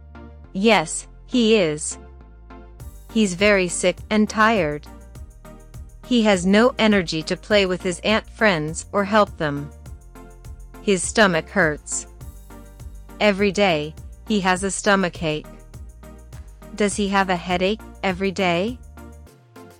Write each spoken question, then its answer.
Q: Does he have a headache every day?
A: No, he doesn't.